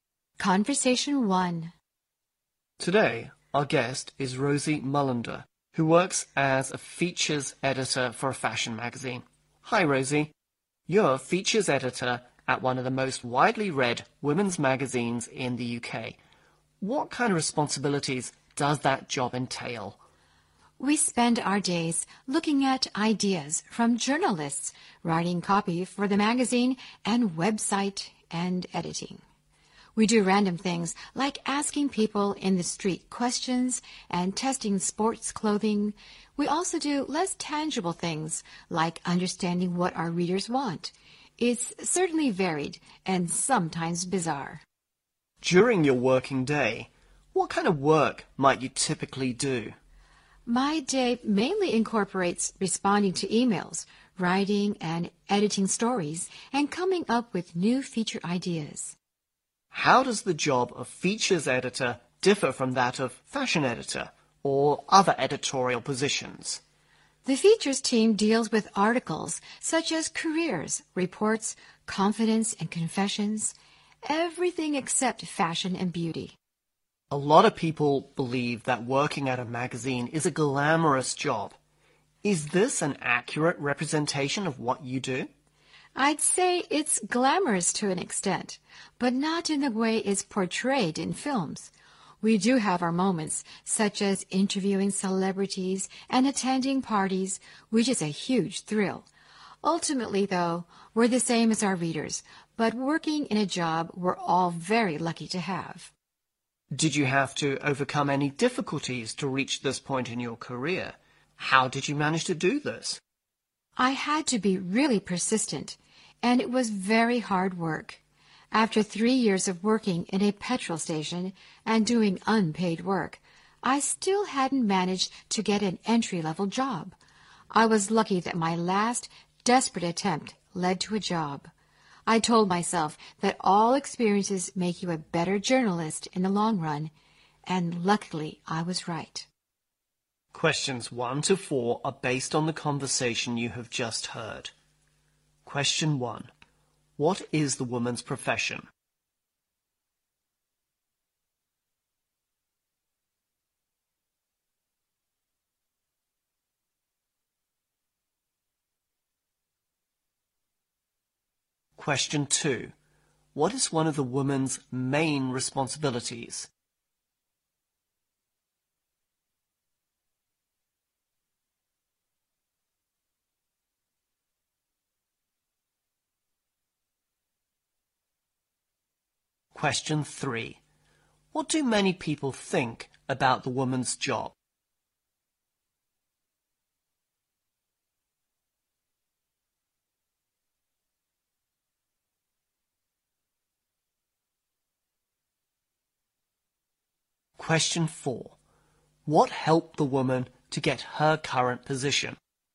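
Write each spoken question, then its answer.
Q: What is the woman's profession?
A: Features editor at a fashion magazine

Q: What is one of the woman's main responsibilities?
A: Writing and editing stories and coming up with new feature ideas

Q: What do many people think about the woman's job?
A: It is glamorous

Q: What helped the woman to get her current position?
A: Her persistence and hard work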